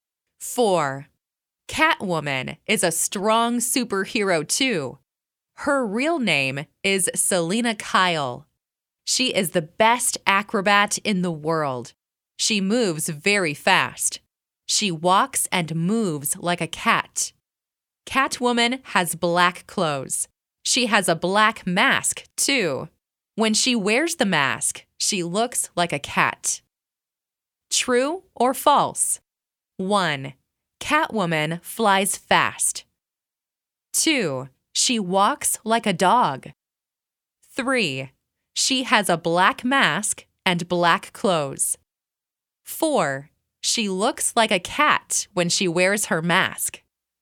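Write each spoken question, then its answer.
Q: Catwoman flies fast.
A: False

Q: She walks like a dog.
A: False

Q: She has a black mask and black clothes.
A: True

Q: She looks like a cat when she wears her mask.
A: True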